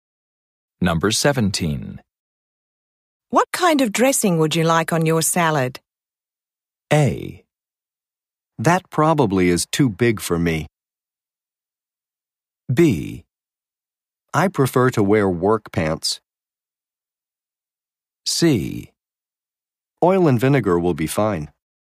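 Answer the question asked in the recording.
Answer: C: Oil and vinegar will be fine.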